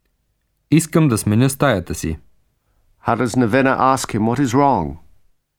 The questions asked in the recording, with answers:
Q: How does Navina ask him what is wrong?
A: Какви оплаквания имате?